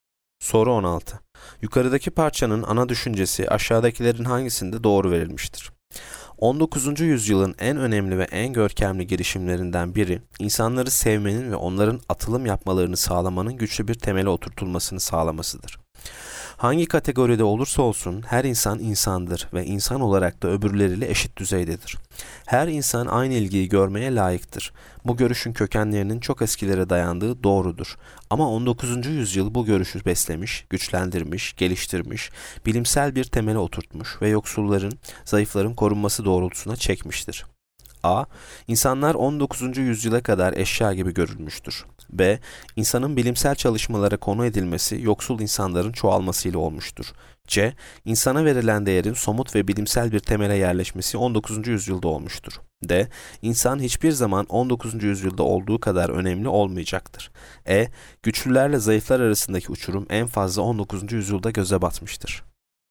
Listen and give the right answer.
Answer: Yanıt C. İnsana verilen değerin somut ve bilimsel bir temele yerleşmesi 19.